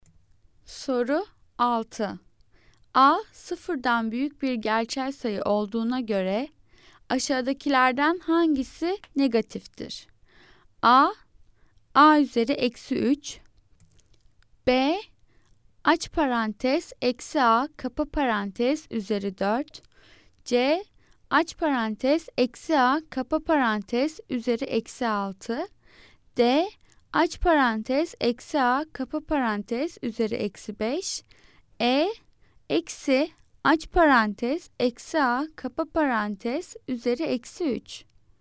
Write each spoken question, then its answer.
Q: A, sıfırdan büyük bir gerçel sayı olduğuna göre aşağıdakilerden hangisi negatiftir?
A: Cevap D, aç parantez eksi A, kapa parantez üzeri eksi 5.